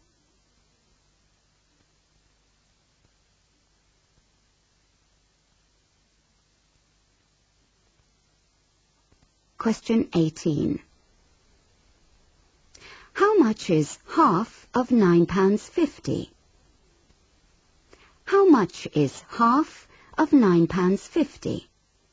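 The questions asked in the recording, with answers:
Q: How much is half of £9.50?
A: £4.75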